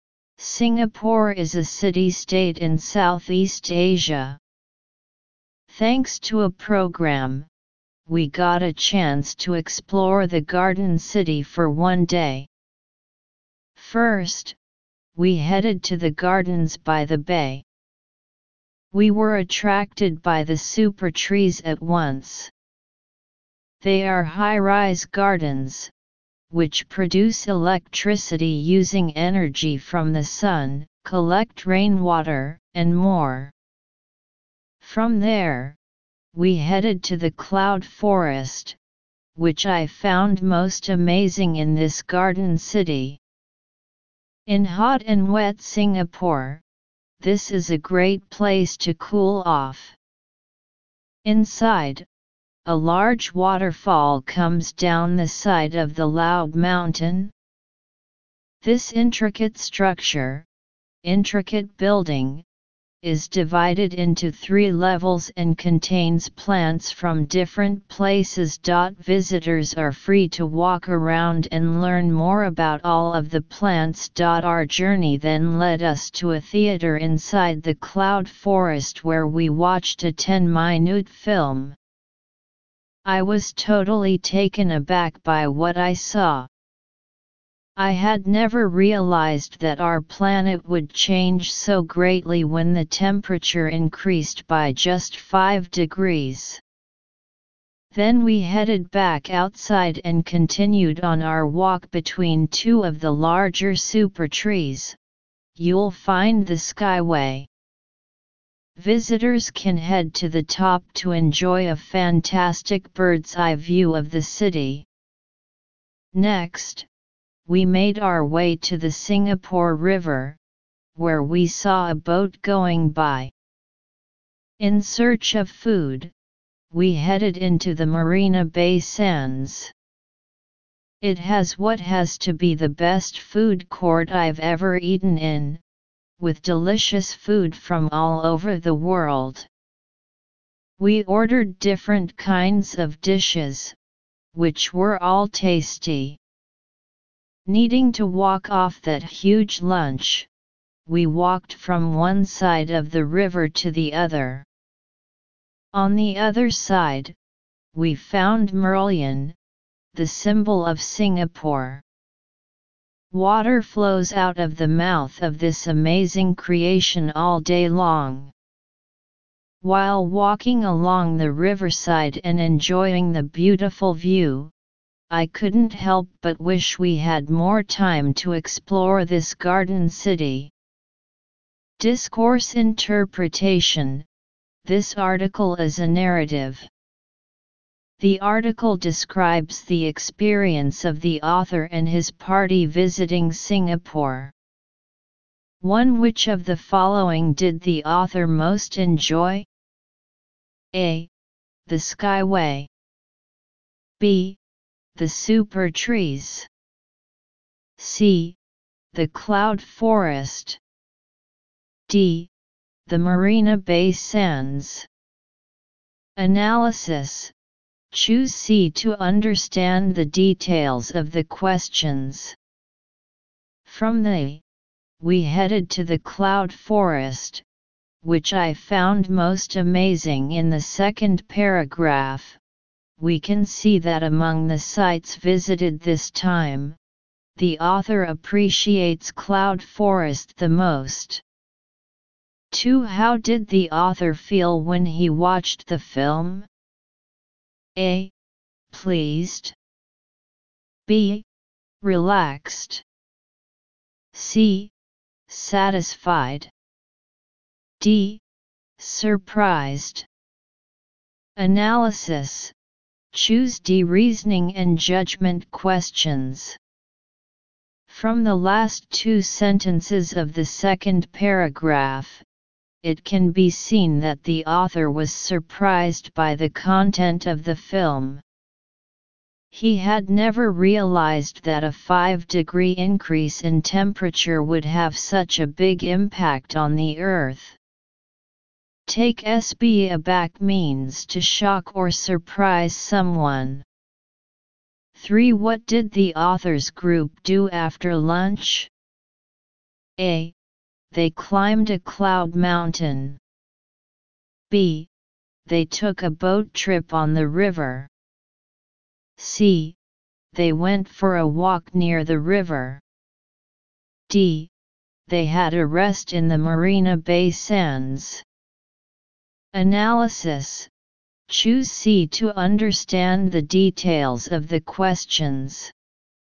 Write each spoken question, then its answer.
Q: Which of the following did the author most enjoy?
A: Choose C

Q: How did the author feel when he watched the film?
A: Choose D.

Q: What did the authors group do after lunch?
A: Choose C